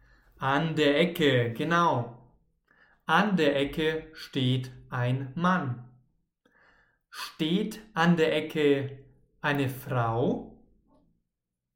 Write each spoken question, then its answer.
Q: Steht an der Ecke eine Frau?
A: Nein, keine Frau. An der Ecke steht ein Mann.